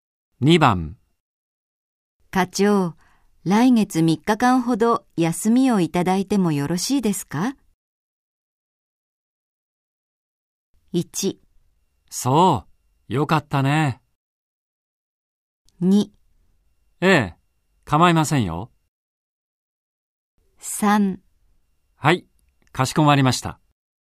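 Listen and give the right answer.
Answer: 2: ええ、構いませんよ。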